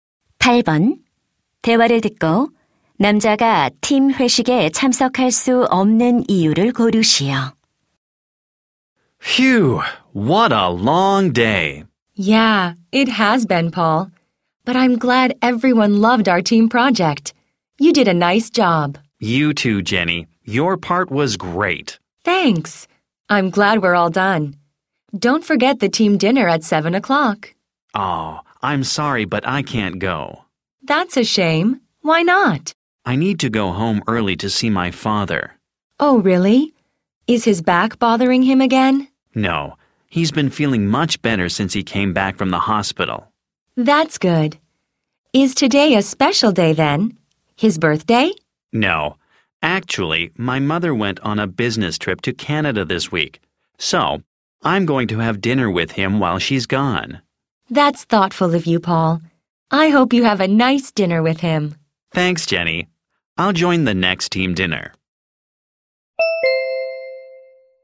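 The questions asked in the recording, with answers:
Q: 대화를 듣고 남자가 팀 회식에 참석할 수 없는 이유를 고르시오.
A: 어머니가 출장 중이라 아버지와 저녁을 먹어야 해서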